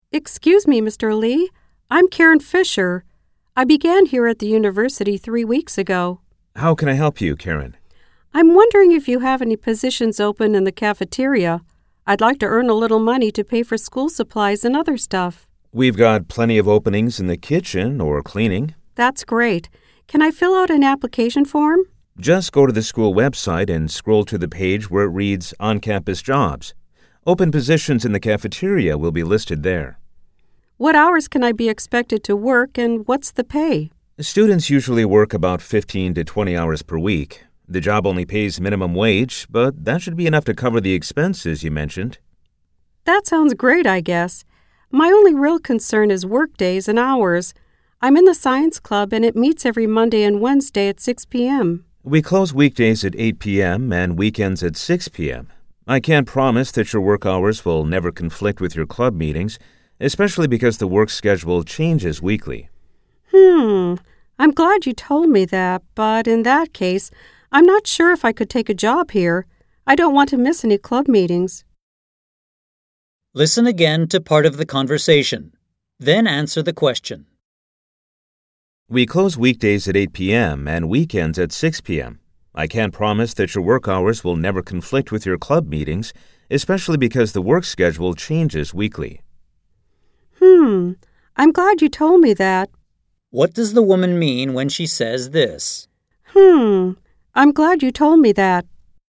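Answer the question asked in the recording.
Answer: She is grateful to learn about the possible schedule conflict, which makes her doubt she can take the job.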